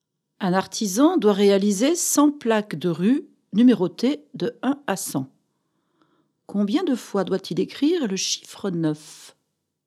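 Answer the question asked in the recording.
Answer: 20 fois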